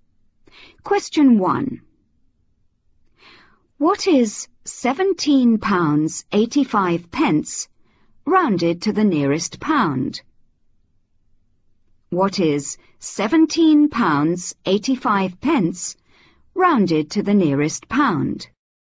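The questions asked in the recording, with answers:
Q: What is 17 pounds 85 pence rounded to the nearest pound?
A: £18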